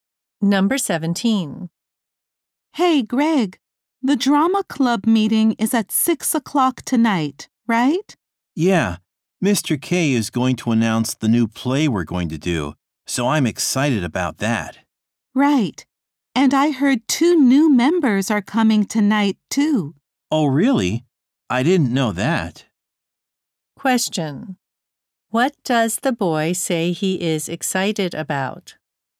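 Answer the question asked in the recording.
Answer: The announcement of the new play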